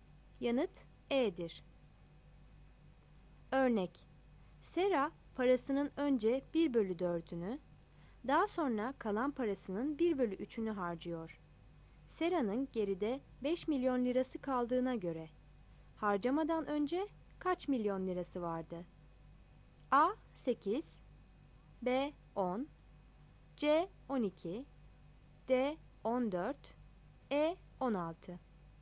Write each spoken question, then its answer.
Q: Sera'nın geride 5 milyon lirası kaldığına göre, harcamadan önce kaç milyon lirası vardı?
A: Yanıt B'dir.